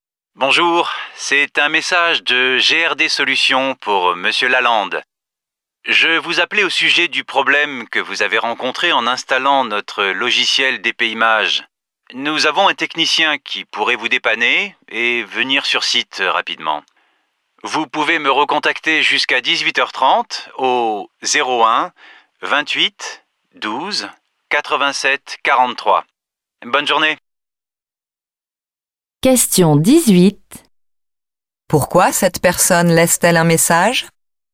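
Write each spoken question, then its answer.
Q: Pourquoi cette personne laisse-t-elle un message?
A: Pour proposer l'intervention d'un technicien pour le problème d'installation du logiciel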